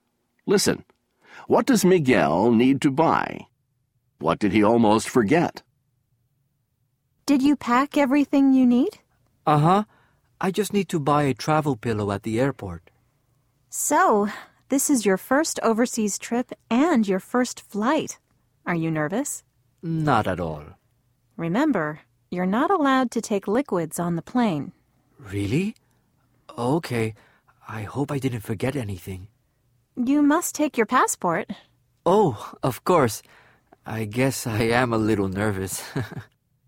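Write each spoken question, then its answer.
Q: What does Miguel need to buy?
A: A travel pillow

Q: What did he almost forget?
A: His passport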